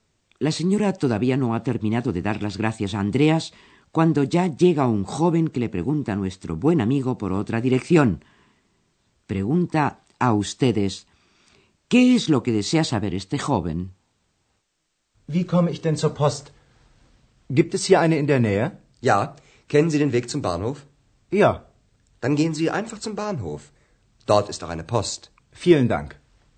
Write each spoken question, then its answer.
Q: ¿Qué es lo que desea saber este joven?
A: El joven deseaba saber si hay una